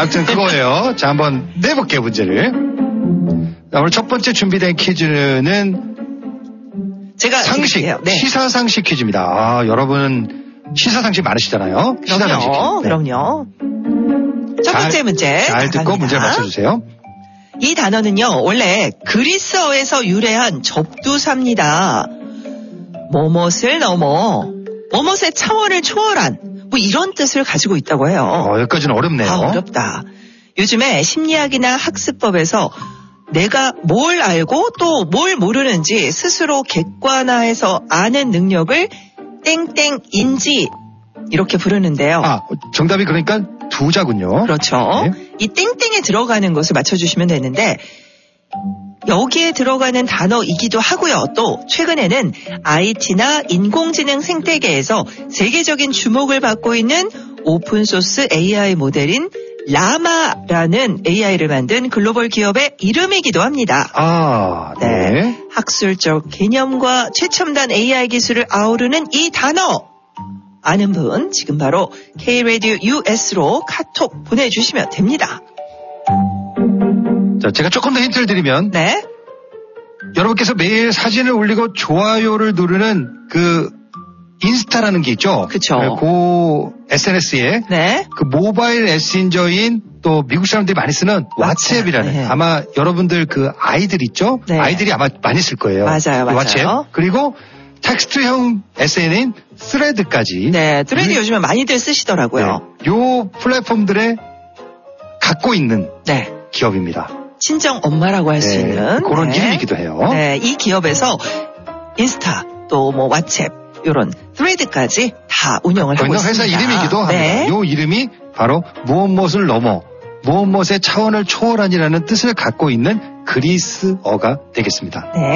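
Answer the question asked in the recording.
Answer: 메타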